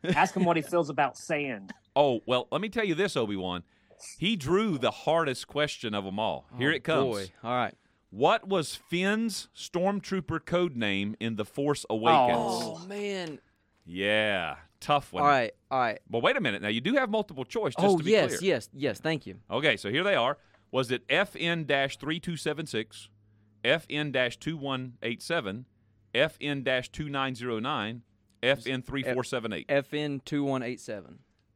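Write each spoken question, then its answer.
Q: What was Finn's stormtrooper code name in The Force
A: B: FN two one eight seven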